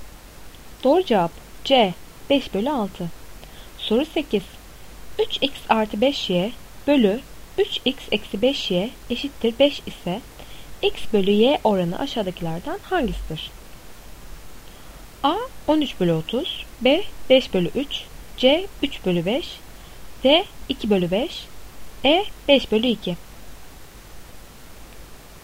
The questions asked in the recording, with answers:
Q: 3X artı 5Y bölü 3X eksi 5Y eşittir 5 ise X bölü Y oranı aşağıdakilerden hangisidir?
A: Doğru cevap E 5 bölü 2.